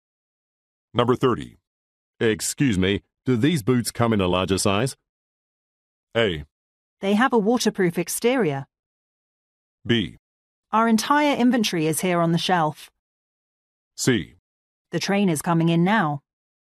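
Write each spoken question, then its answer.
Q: Excuse me, do these boots come in a larger size?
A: B: Our entire inventory is here on the shelf.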